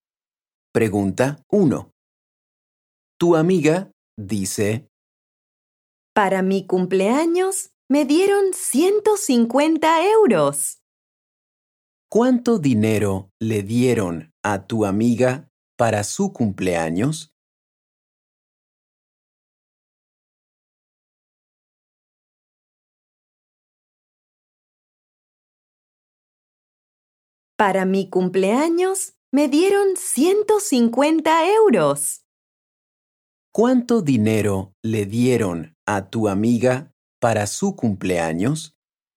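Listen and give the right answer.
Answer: 150 euros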